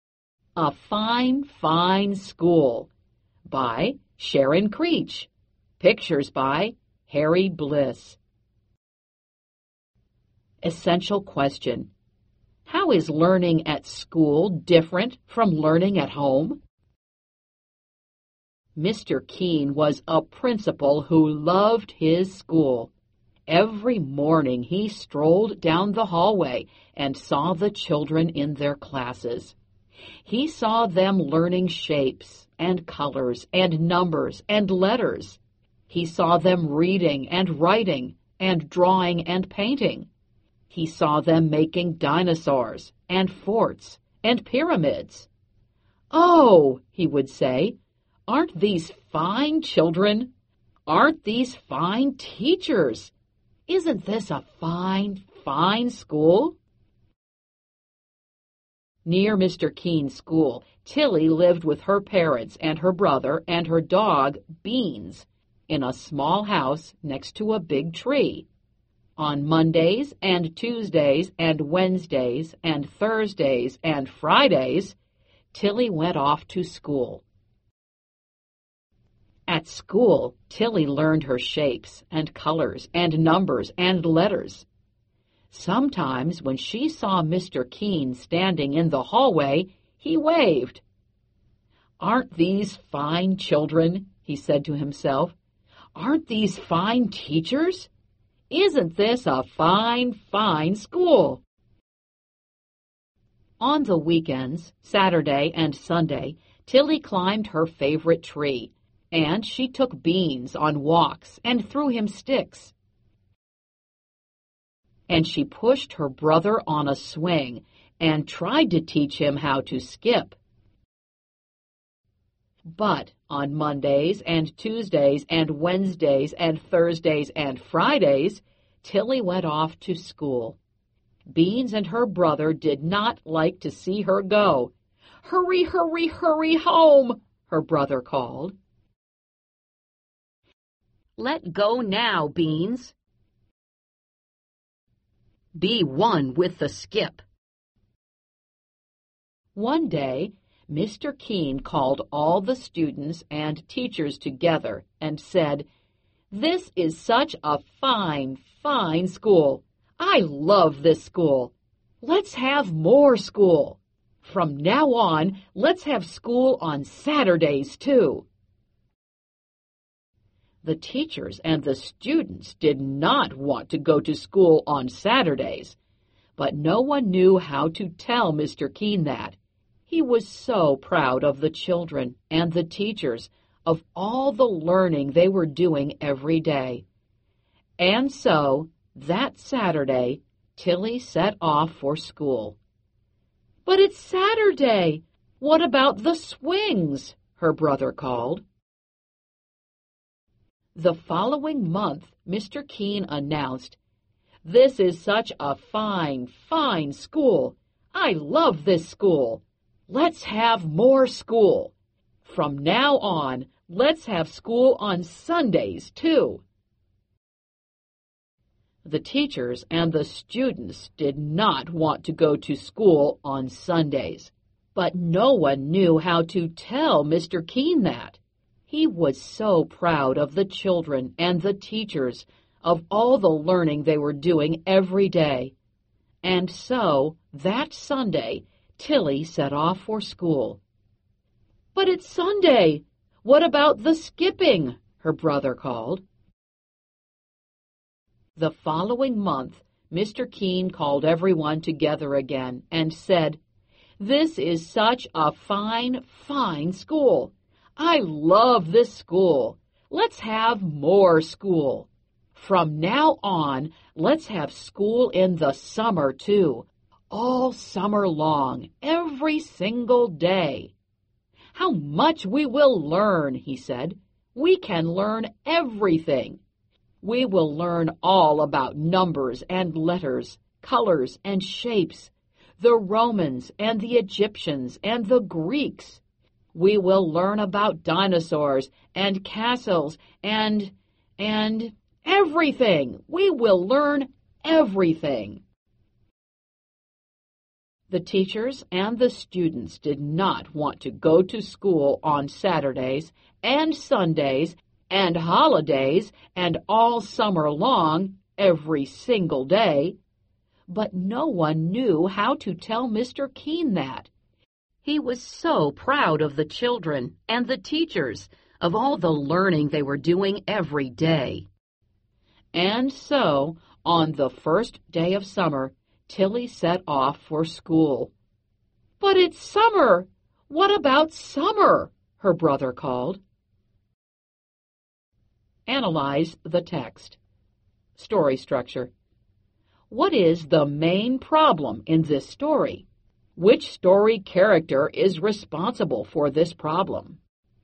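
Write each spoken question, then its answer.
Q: What is the main problem in this story?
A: Mr. Keene keeps adding more school days (Saturdays, Sundays, all summer), and no one knows how to tell him they don't want it

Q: Which story character is responsible for this problem?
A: Mr. Keene, the principal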